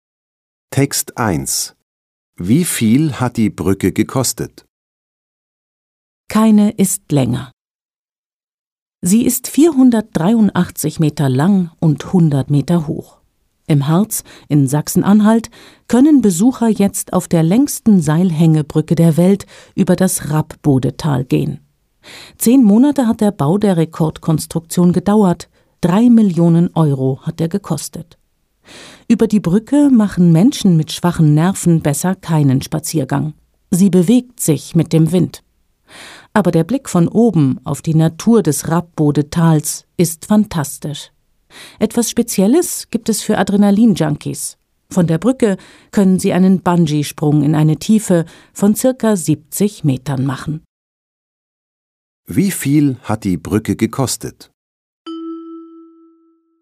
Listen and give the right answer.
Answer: Sie hat 3 Millionen Euro gekostet.